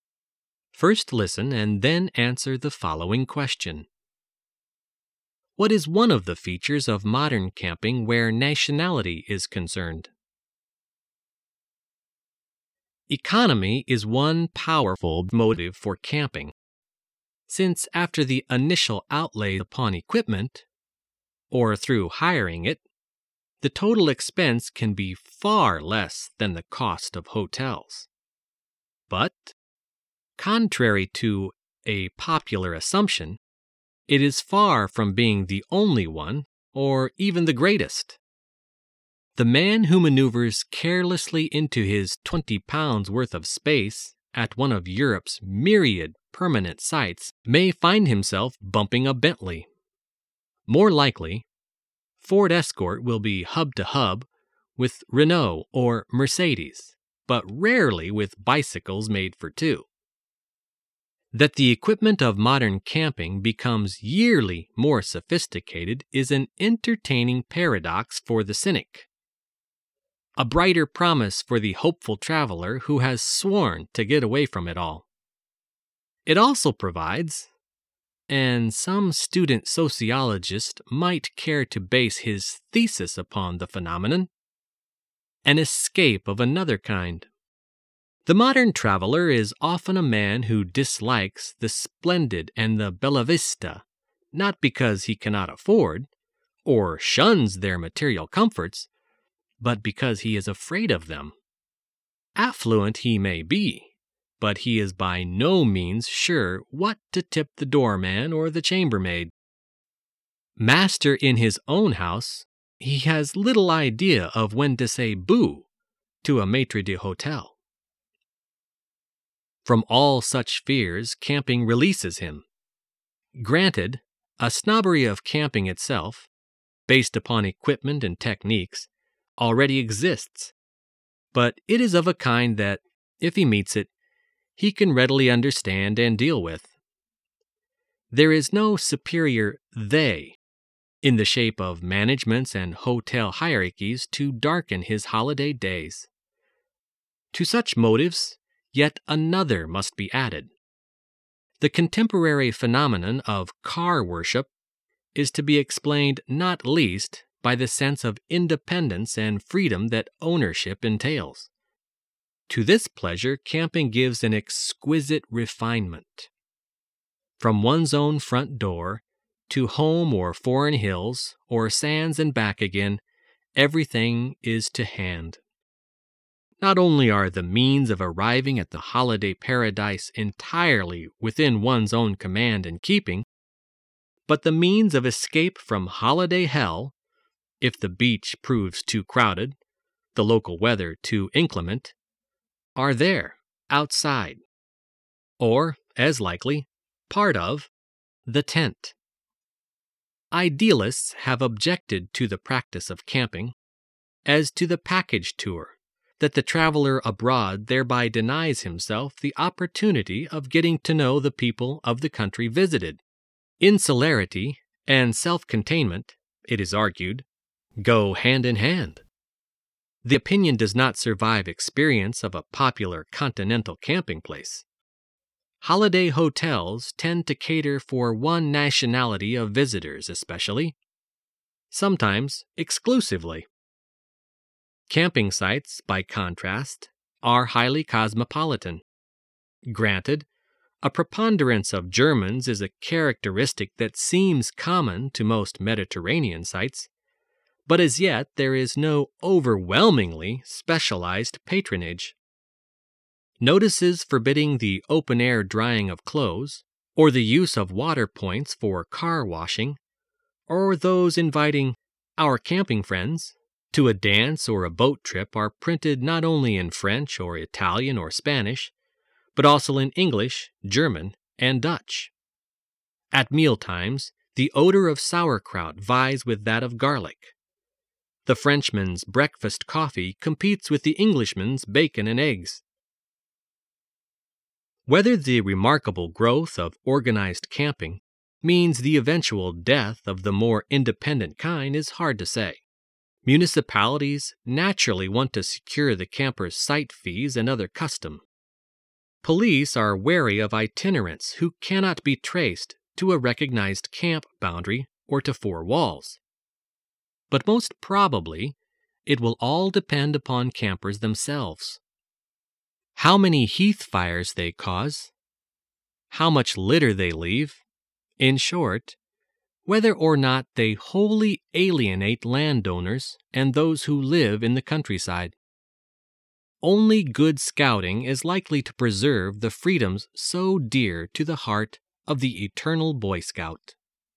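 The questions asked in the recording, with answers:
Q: What is one of the features of modern camping where nationality is concerned?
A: Camping sites are highly cosmopolitan, not catering to one nationality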